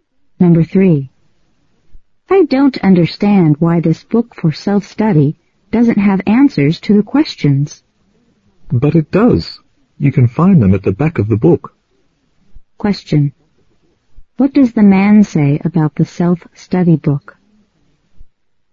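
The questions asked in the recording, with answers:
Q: What does the man say about the self-study book?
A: It has answers at the back of the book.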